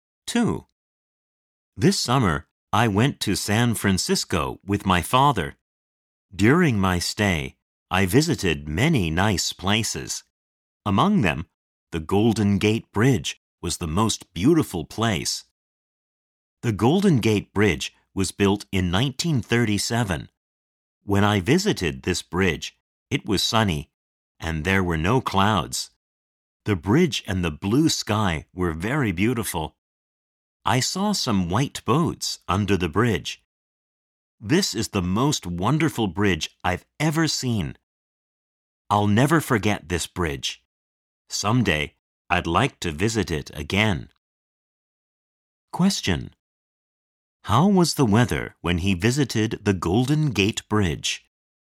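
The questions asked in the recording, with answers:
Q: How was the weather when he visited the Golden Gate Bridge?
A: It was sunny with no clouds.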